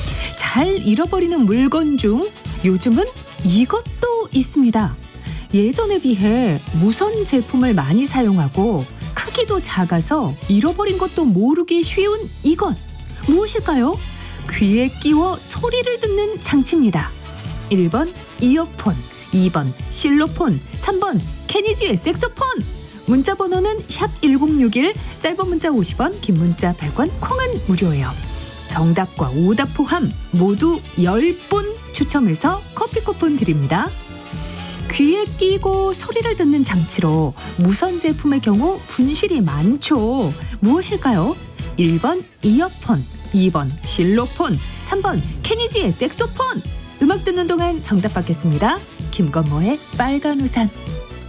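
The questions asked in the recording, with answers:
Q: 예전에 비해 무선 제품을 많이 사용하고 크기도 작아서 잃어버린 것도 모르기 쉬운 이것 무엇일까요?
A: 1: 이어폰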